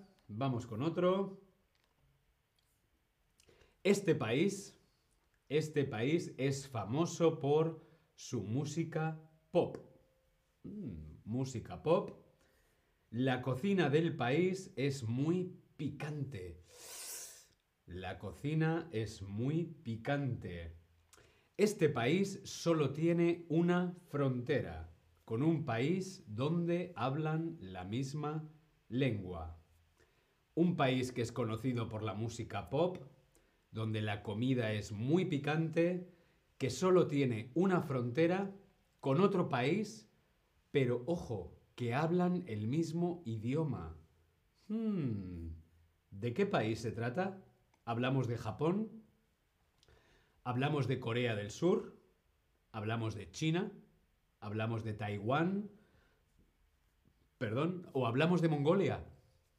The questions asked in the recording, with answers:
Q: ¿Hablamos de Japón? ¿Hablamos de Corea del Sur?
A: Muy bien, claro que sí, Corea del Sur.